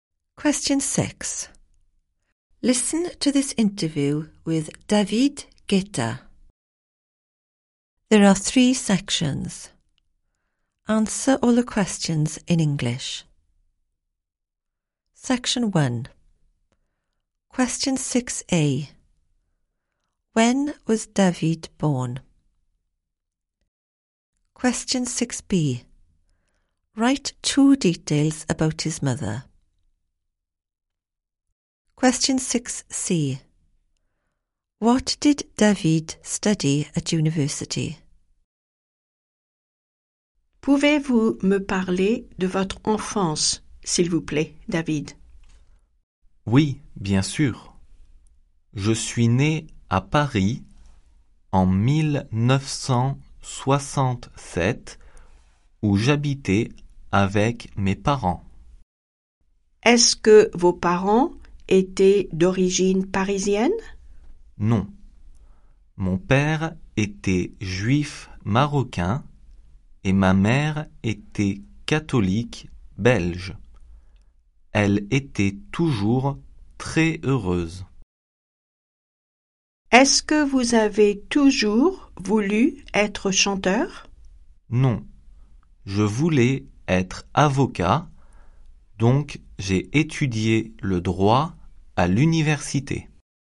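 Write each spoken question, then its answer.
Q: When was David born?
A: 1967

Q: Write 2 details about his mother.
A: Belgian, Catholic, always very happy

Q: What did David study at university?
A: Law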